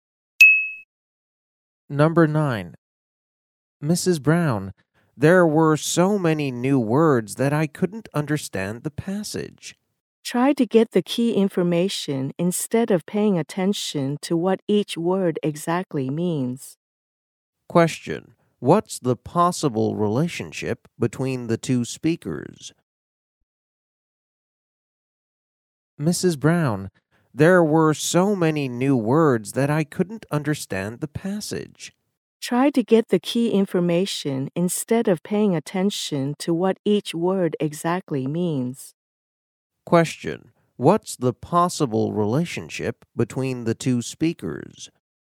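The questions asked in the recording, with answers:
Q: What's the possible relationship between the two speakers?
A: Teacher and student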